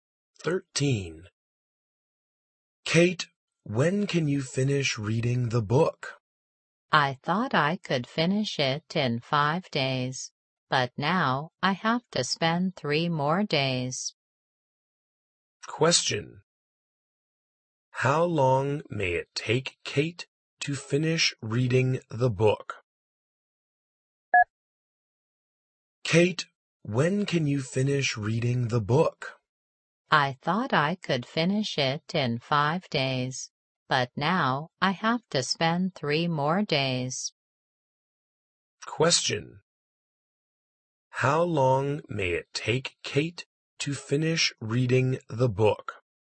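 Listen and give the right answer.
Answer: 8 days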